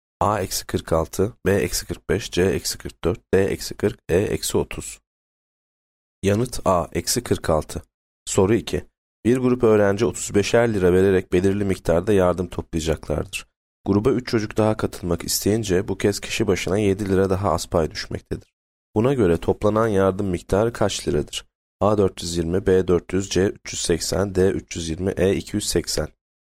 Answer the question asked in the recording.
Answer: Yanıt A 420.